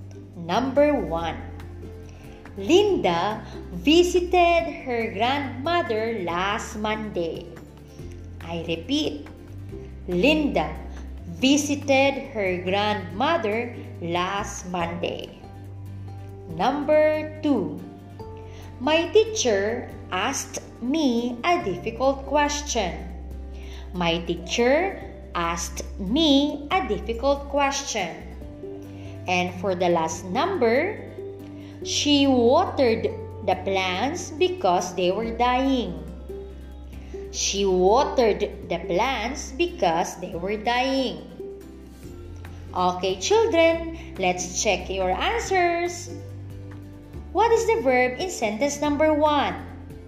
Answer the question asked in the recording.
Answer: Correct. It's visited.